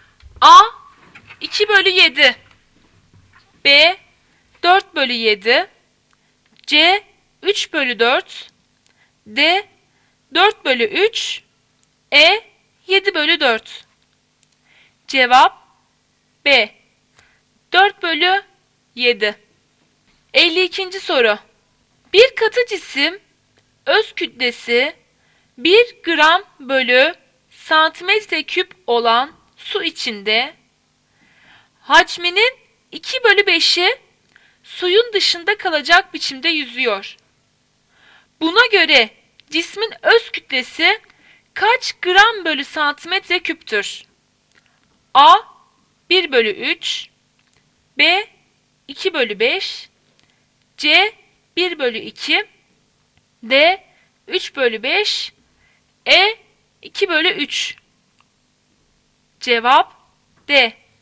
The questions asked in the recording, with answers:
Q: Buna göre cismin öz kütlesi kaç gram bölü santimetre küptür?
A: Cevap D.